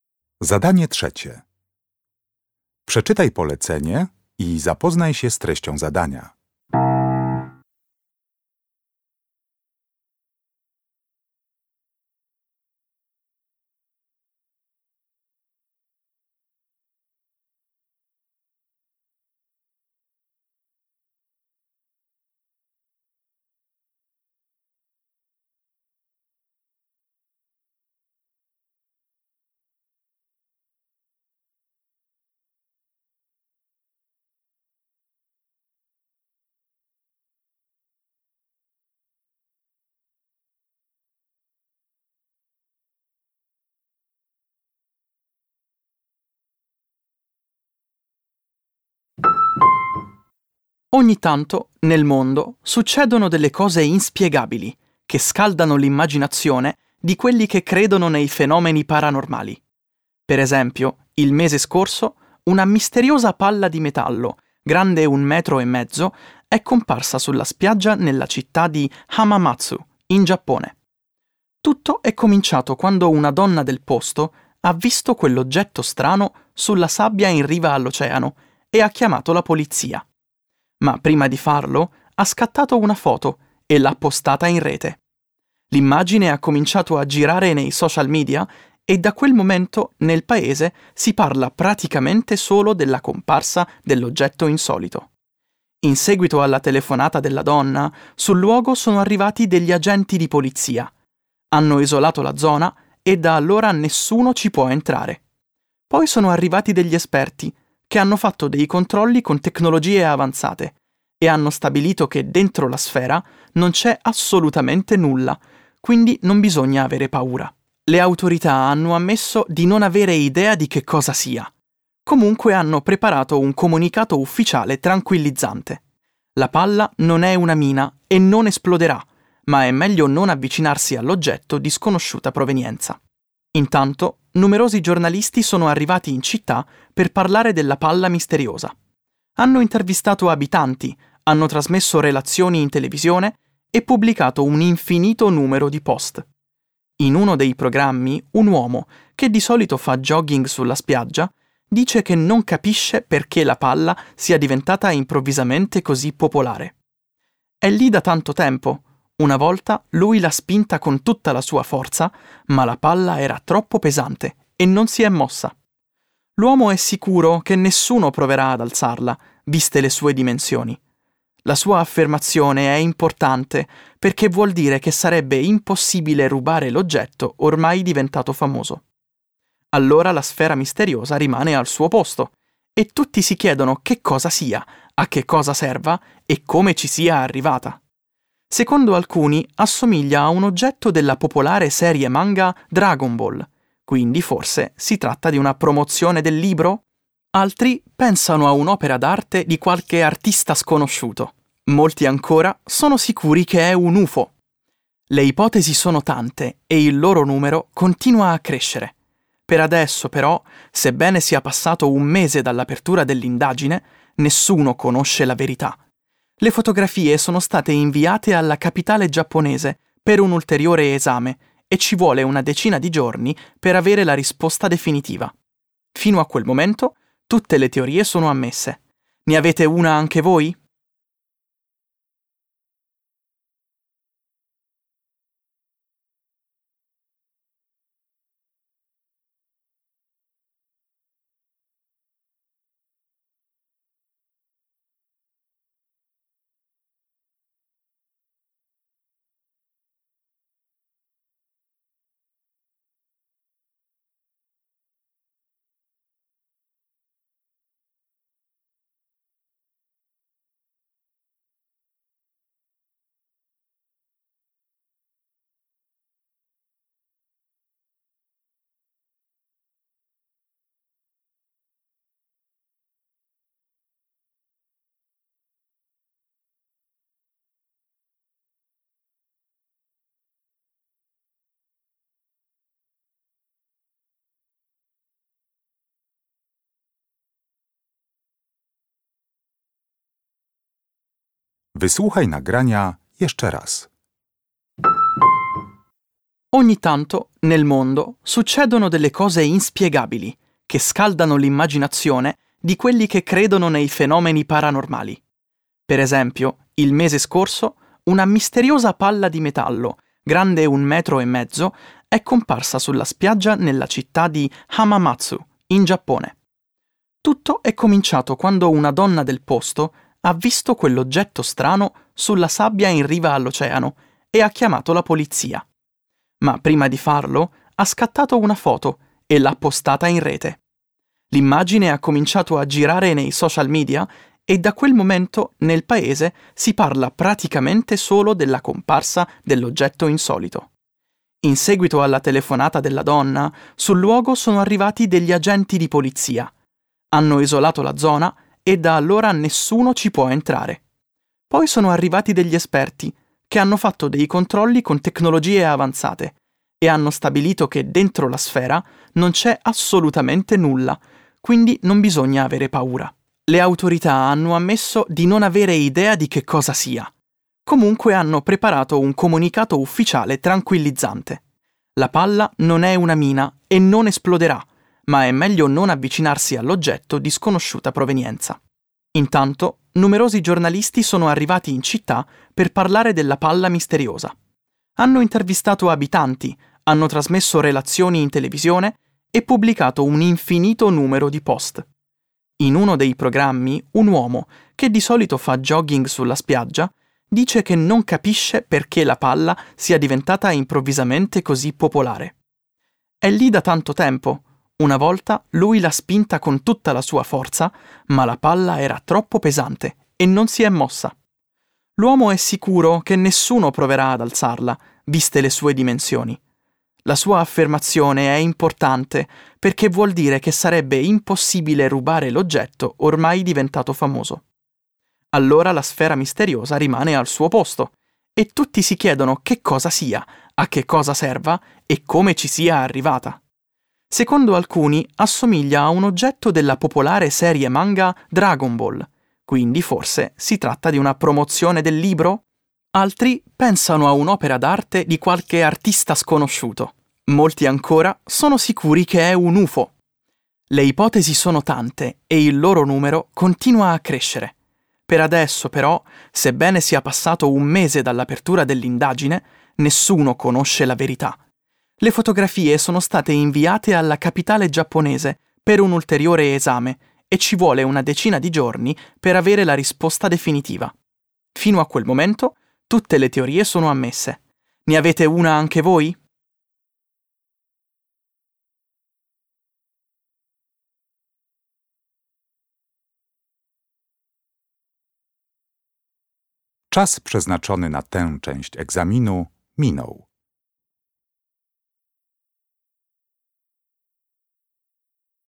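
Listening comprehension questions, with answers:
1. Una donna giapponese, quando ha visto la sfera misteriosa in spiaggia, per prima cosa .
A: ha scattato una foto

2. Gli esperti hanno scoperto che l'oggetto non è pericoloso perché dentro .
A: non c'è nulla

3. Un uomo, che di solito corre in spiaggia, ha provato anche a la sfera, ma senza risultato.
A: spingere

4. Bisogna aspettare ancora circa per sapere di che cosa si tratti.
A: dieci giorni

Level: Poziom: rozszerzony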